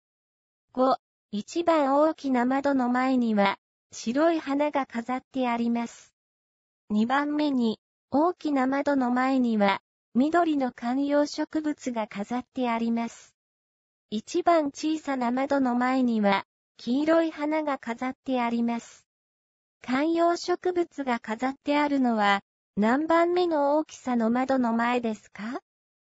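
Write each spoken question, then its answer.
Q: 観葉植物が飾ってあるのは何番目の大きさの窓の前ですか?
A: 2番目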